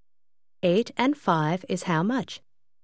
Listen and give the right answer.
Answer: 8 and 5 is 13.